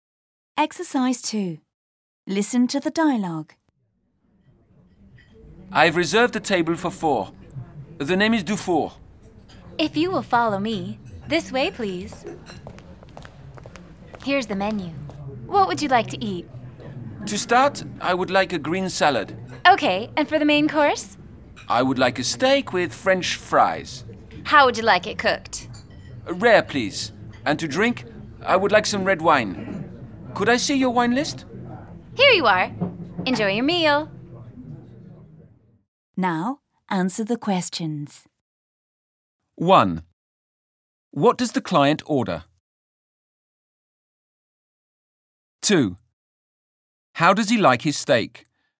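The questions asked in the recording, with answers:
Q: What does the client order?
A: A green salad, a steak with French fries, and red wine

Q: How does he like his steak?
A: Rare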